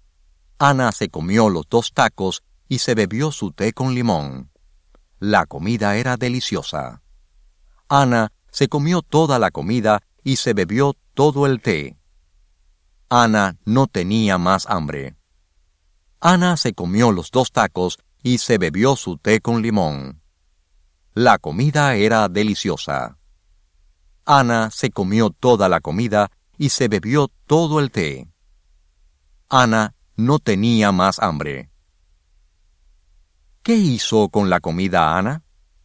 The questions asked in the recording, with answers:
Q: ¿Qué hizo con la comida Ana?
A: Ana se comió toda la comida.